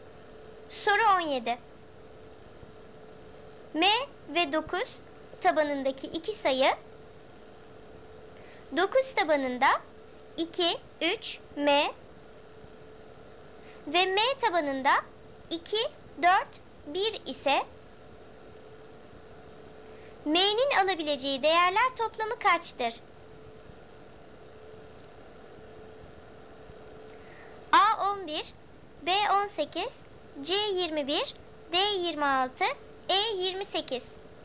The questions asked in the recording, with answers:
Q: M'nin alabileceği değerler toplamı kaçtır?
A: Doğru cevap D 26.